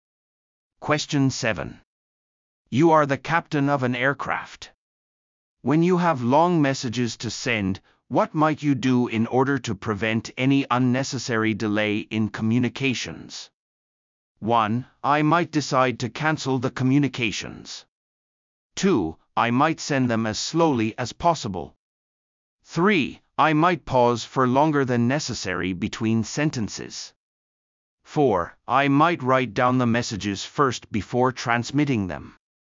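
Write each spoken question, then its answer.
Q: When you have long messages to send, what might you do in order to prevent any unnecessary delay in communications?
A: 4: I might write down the messages first before transmitting them.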